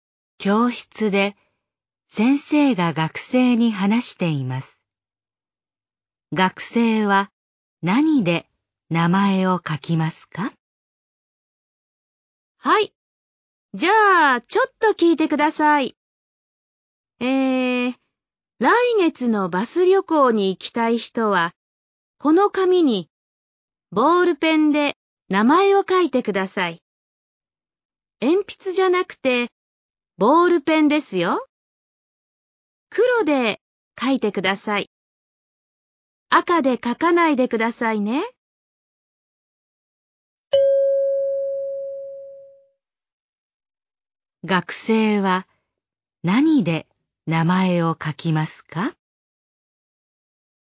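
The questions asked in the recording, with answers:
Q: 学生は何で名前を書きますか?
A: 黒のボールペン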